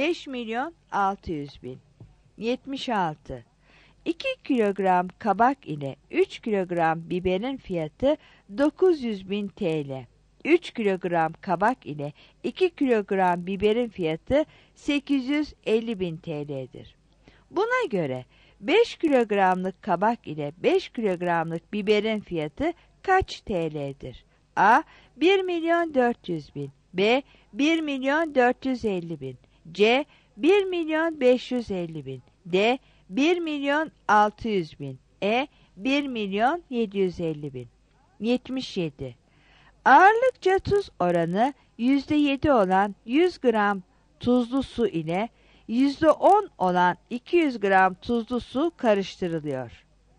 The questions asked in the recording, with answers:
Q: Buna göre 5 kilogramlık kabak ile 5 kilogramlık biberin fiyatı kaç TL'dir?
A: 76 E